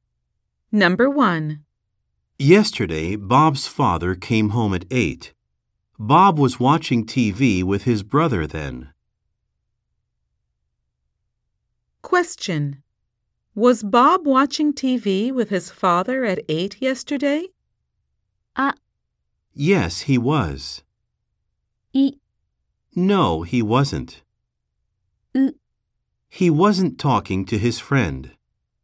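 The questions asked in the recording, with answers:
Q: Was Bob watching TV with his father at 8 yesterday?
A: B: No, he wasn't.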